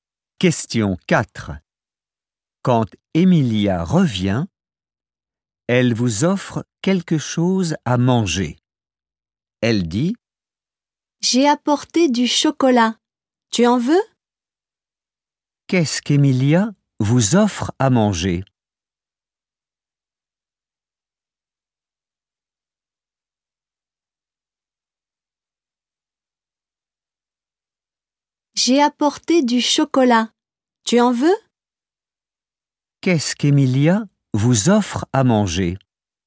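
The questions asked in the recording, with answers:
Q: Qu'est-ce qu'Emilia vous offre à manger ?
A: Du chocolat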